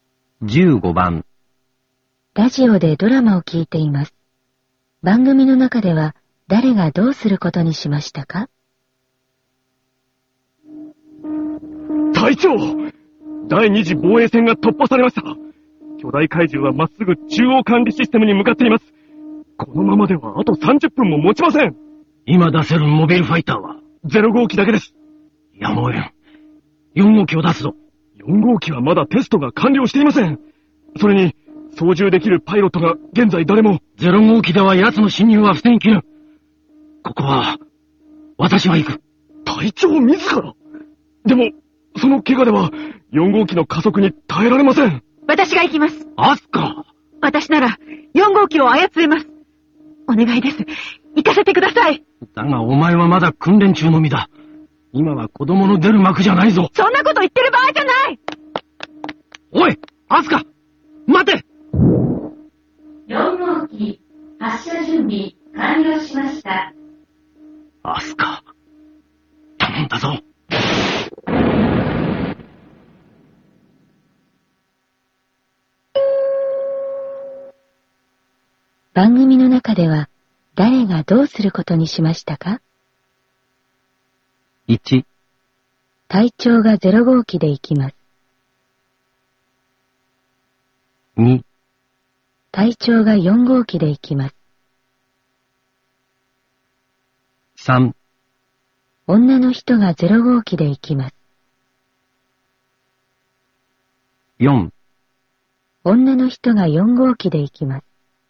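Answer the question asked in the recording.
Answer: 4: 女の人が4号機で行きます。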